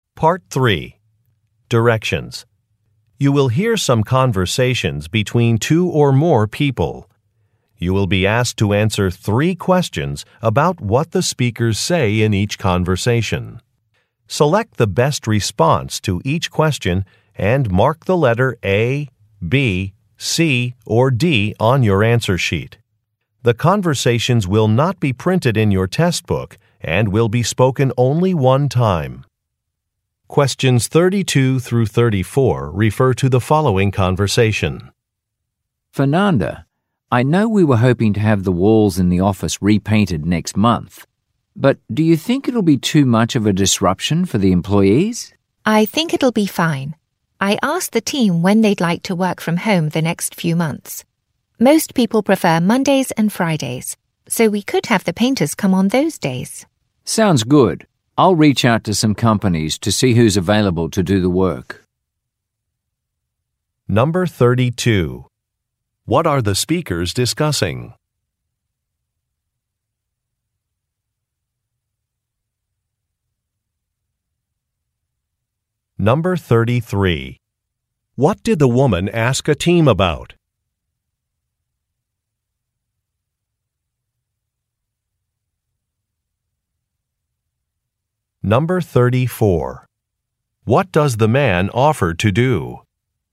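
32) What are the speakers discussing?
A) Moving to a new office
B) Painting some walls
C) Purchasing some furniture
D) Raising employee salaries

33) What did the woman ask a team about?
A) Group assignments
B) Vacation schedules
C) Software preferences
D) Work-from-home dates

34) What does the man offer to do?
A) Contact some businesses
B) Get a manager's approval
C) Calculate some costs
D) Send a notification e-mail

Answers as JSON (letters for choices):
{"32": "B", "33": "D", "34": "A"}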